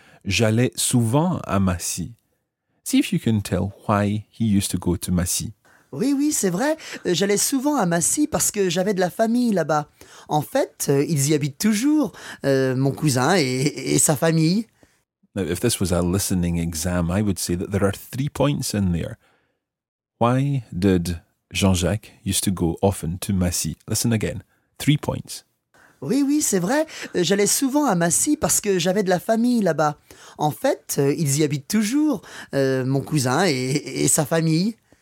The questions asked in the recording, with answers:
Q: Why did Jean-Jacques used to go often to Massy?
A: He said, j'avais de la famille là-bas.